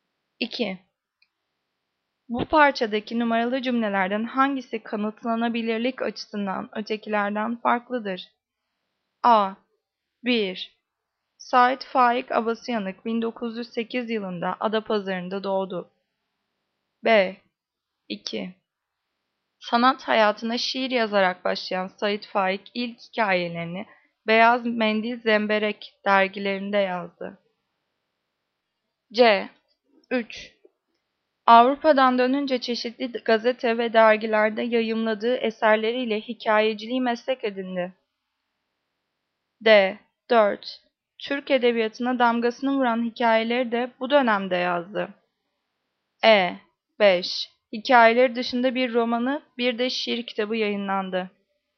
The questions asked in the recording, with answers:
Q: Bu parçadaki numaralı cümlelerden hangisi kanıtlanabilirlik açısından ötekilerden farklıdır?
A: Cevap D. 4. Türk edebiyatına damgasını vuran hikayeleri de bu dönemde yazdı.